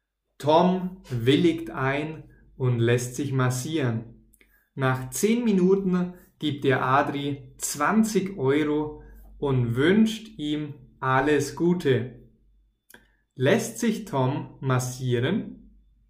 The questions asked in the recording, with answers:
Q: Lässt sich Tom massieren?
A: Ja, er lässt sich massieren.